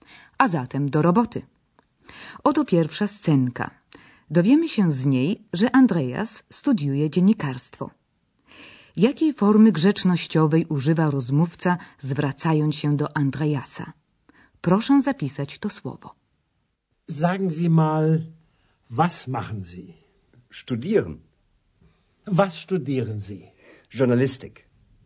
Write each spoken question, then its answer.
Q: jakiej formy grzecznościowej używa rozmówca, zwracając się do Andreasa.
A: grzecznościowa forma zi, czyli pan pani